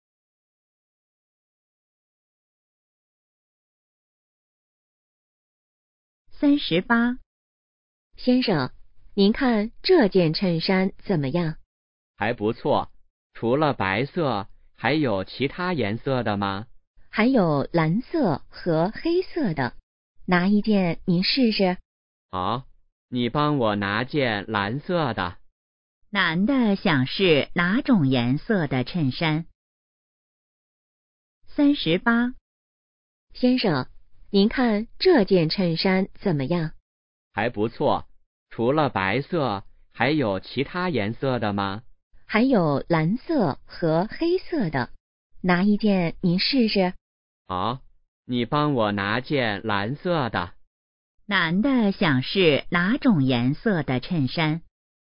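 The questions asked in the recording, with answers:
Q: 男的想试哪种颜色的衬衫?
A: 蓝色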